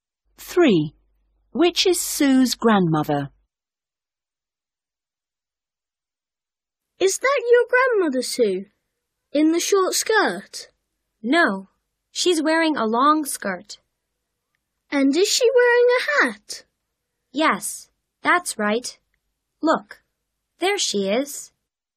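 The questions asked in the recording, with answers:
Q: Which is Sue's grandmother?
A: The one in a long skirt and a hat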